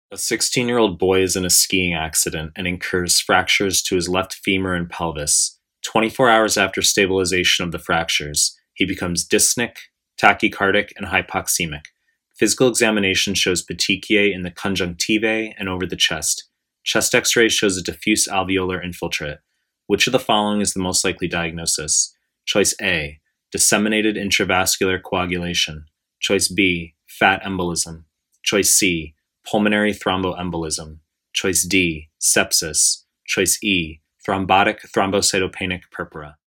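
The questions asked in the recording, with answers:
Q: Which of the following is the most likely diagnosis?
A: B: fat embolism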